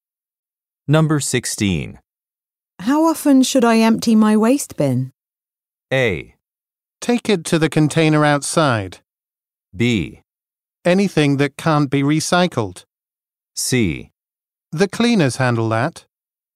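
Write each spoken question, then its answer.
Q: How often should I empty my waste bin?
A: C: The cleaners handle that.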